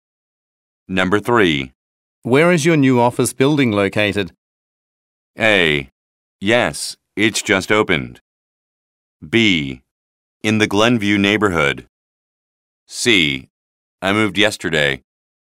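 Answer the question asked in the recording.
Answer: B: In the Glenview neighborhood.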